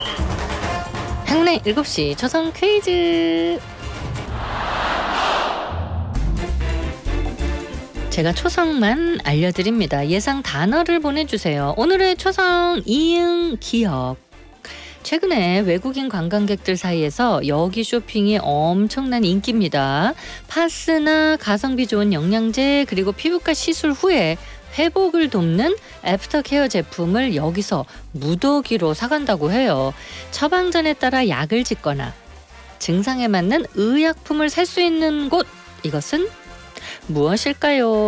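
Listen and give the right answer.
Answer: 약국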